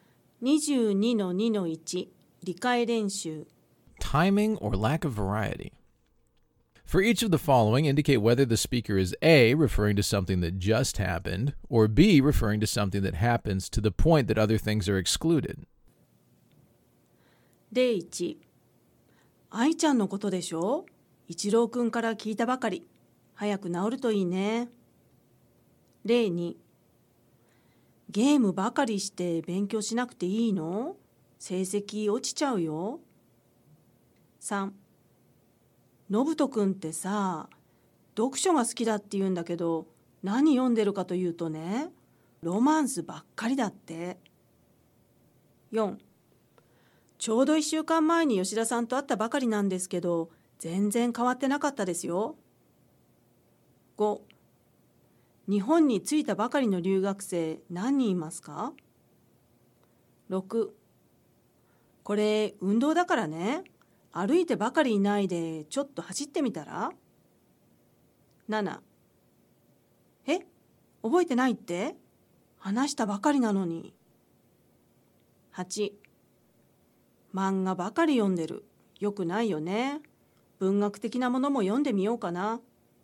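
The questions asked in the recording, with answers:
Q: のぶとくんってさ、読書が好きだって言うんだけど、何読んでるかというとね、ロマンスばっかりだって。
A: B: referring to something that happens to the point that other things are excluded

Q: ちょうど1週間前に吉田さんと会ったばかりなんですけど、全然変わってなかったですよ。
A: A: referring to something that just happened

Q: 日本に着いたばかりの留学生何人いますか。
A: A: referring to something that just happened

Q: これ運動だからね、歩いてばかりいないでちょっと走ってみたら。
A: B: referring to something that happens to the point that other things are excluded

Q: え、覚えてないって、話したばかりなのに。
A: A: referring to something that just happened

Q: 漫画ばかり読んでる、よくないよね。文学的なものも読んでみようかな。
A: B: referring to something that happens to the point that other things are excluded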